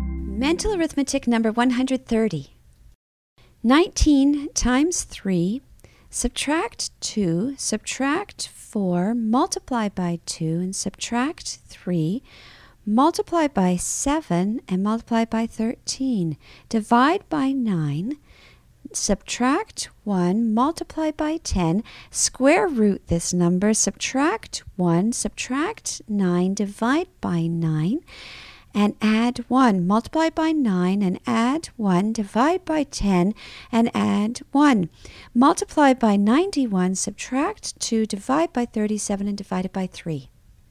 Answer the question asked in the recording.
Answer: And the answer is 9.